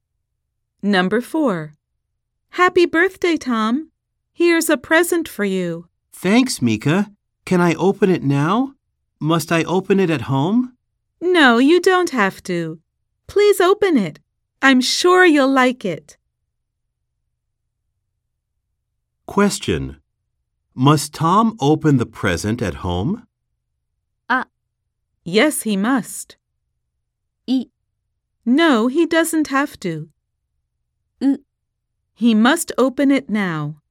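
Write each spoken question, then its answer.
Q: Must Tom open the present at home?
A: B: No, he doesn't have to.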